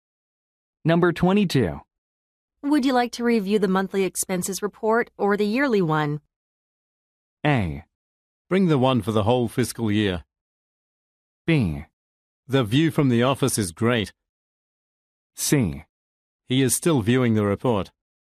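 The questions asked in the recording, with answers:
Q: Would you like to review the monthly expenses report or the yearly one?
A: A: Bring the one for the whole fiscal year.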